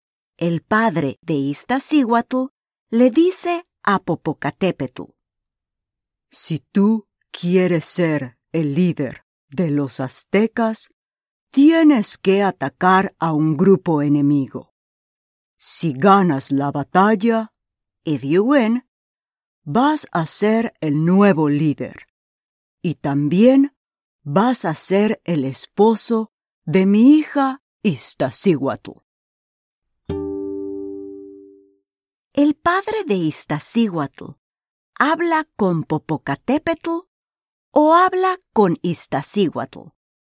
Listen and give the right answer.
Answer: Muy bien. El padre de Iztaccíhuatl habla con Popocatépetl.